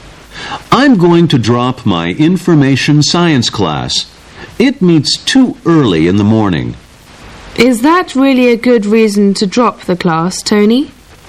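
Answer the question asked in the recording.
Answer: A class meeting early isn't a good reason to drop it.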